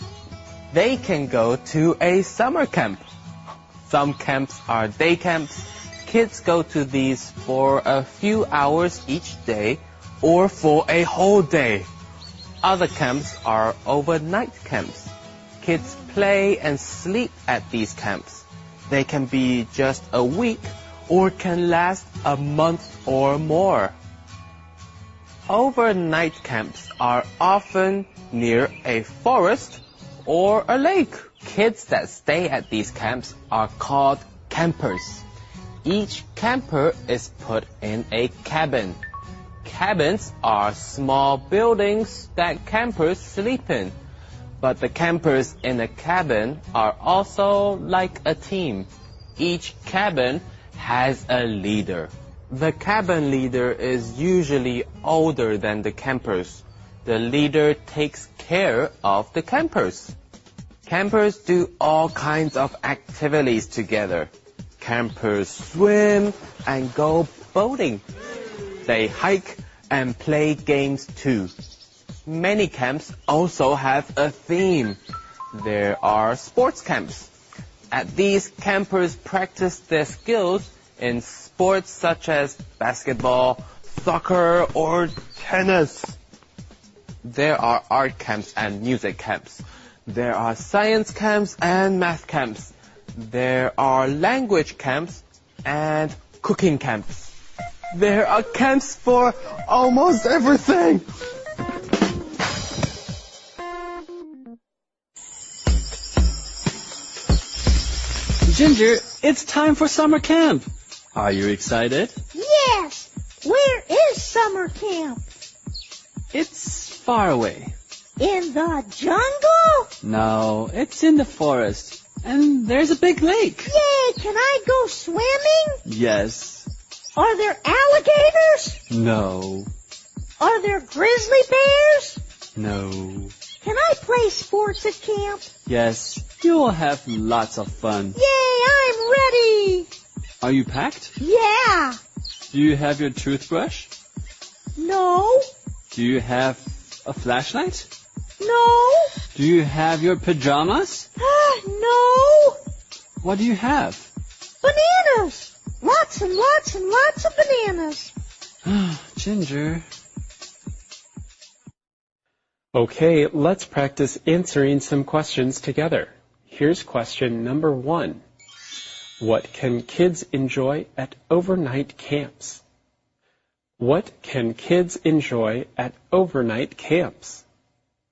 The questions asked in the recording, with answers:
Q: What can kids enjoy at overnight camps?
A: Kids can enjoy all kinds of outdoor activities.